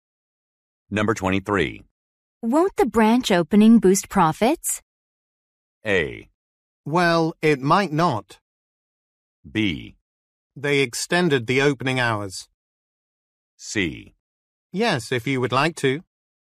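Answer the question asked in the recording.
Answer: A: Well, it might not.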